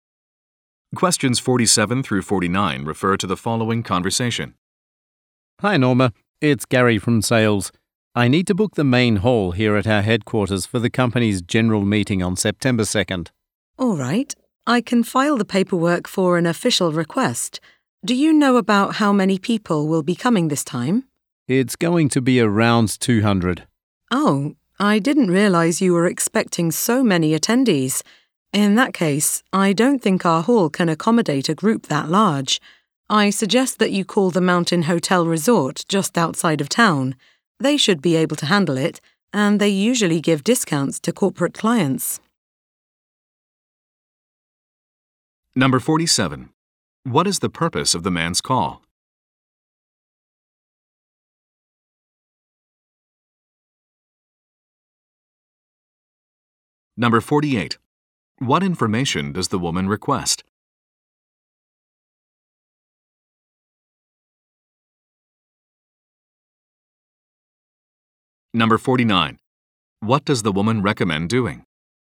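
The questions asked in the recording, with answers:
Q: What is the purpose of the man's call?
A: To book the main hall for the general meeting

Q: What information does the woman request?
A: The number of attendees

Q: What does the woman recommend doing?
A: Calling the Mountain Hotel Resort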